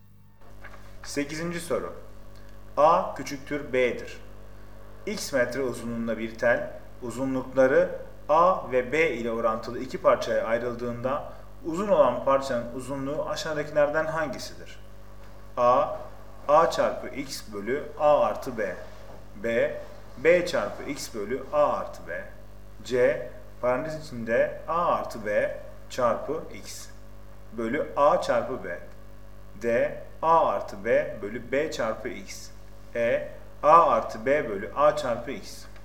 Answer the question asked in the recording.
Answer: Doğru cevap B, B çarpı X bölü A artı B.